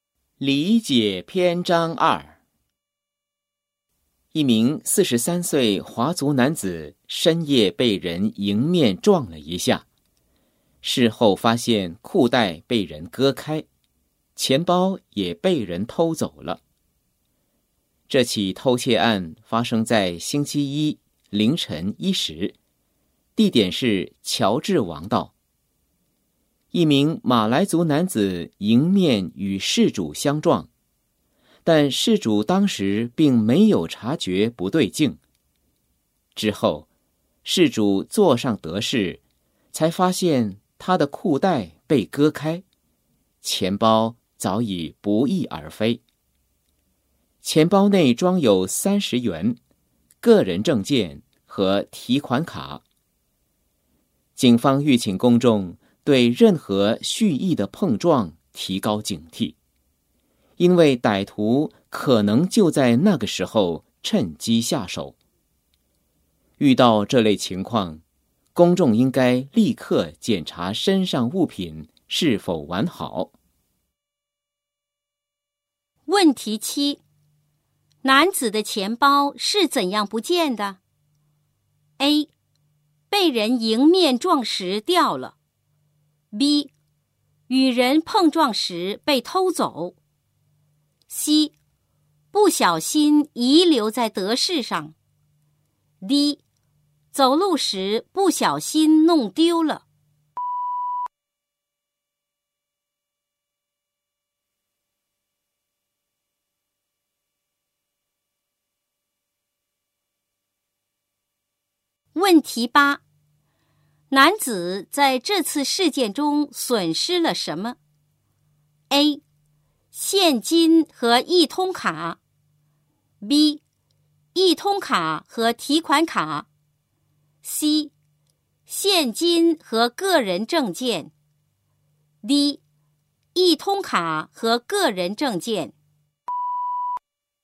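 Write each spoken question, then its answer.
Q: 男子的钱包是怎样不见的?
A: B: 与人碰撞时被偷走。

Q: 男子在这次事件中损失了什么?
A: C: 现金和个人证件。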